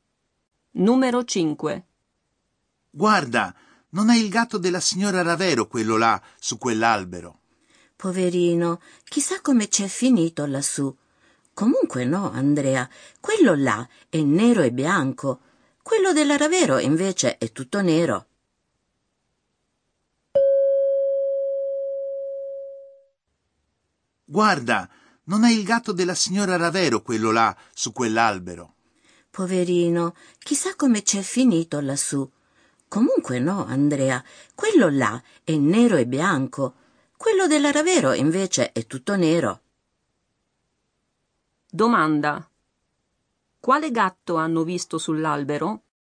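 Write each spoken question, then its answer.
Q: Domanda. Quale gatto hanno visto sull'albero?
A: Un gatto nero e bianco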